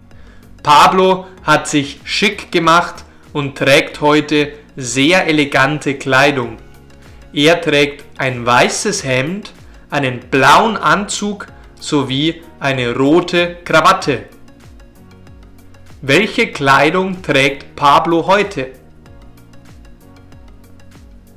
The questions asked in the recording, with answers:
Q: Welche Kleidung trägt Pablo heute?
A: Er trägt heute sehr elegante Kleidung.